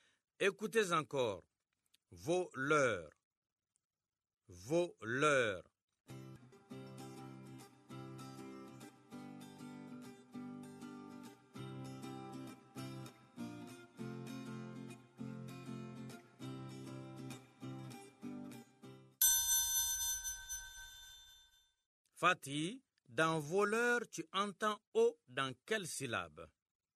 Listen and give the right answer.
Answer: Monsieur, dans vos, la première syllabe.